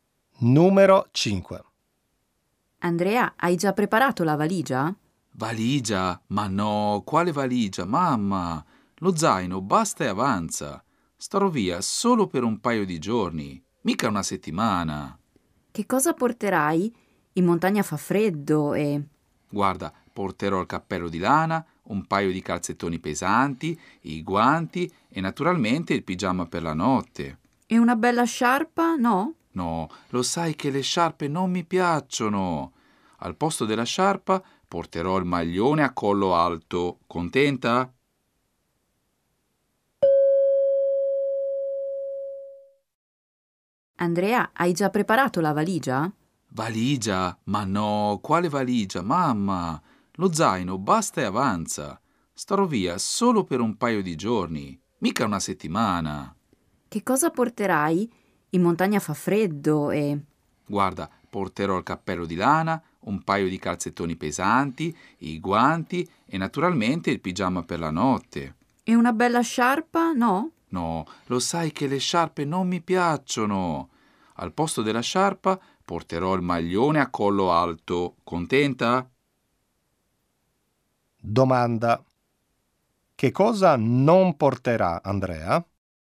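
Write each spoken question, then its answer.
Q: Che cosa non porterà Andrea?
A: La sciarpa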